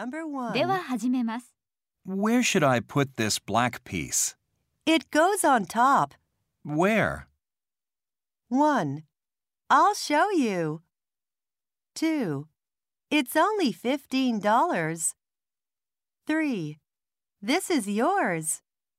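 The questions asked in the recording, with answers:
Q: Where?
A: 1: I'll show you.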